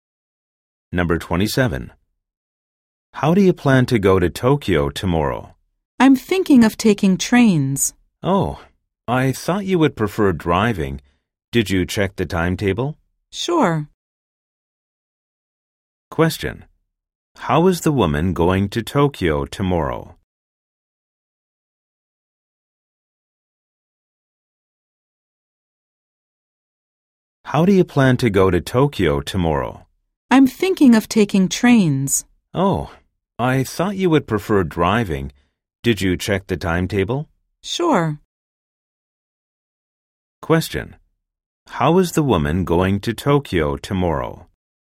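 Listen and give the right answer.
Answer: By train.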